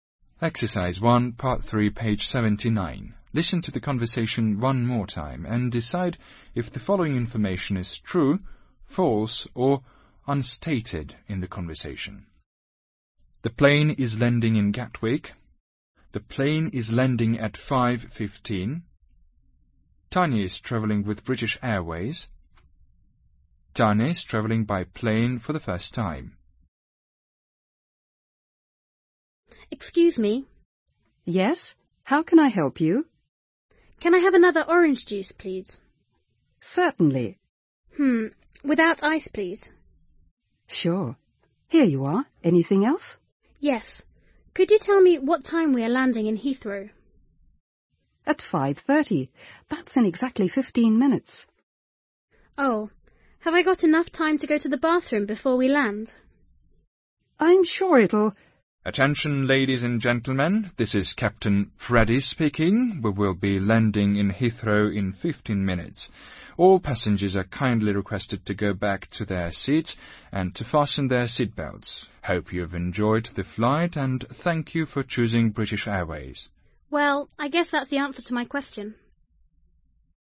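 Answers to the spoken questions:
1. False
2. False
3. True
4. Unstated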